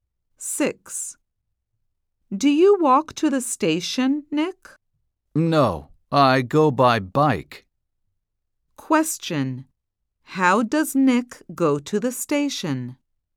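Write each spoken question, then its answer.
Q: How does Nick go to the station?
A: By bike.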